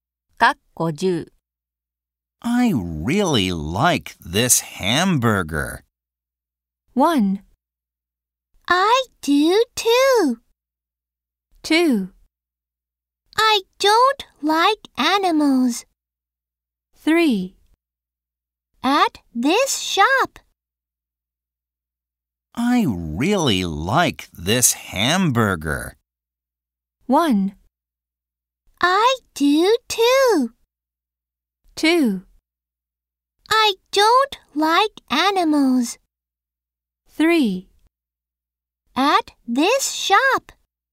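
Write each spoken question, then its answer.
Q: I really like this hamburger.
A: 1: I do too.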